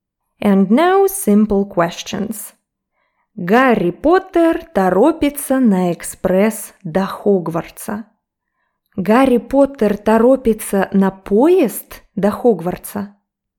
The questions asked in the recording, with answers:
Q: Гарри Поттер торопится на поезд до Хогвартса?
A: Да, он торопится на поезд экспресс.